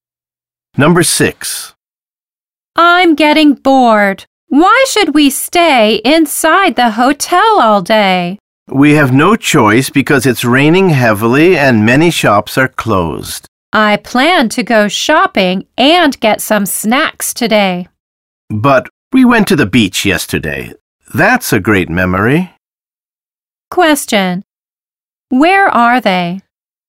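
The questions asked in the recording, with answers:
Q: Where are they?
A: In a hotel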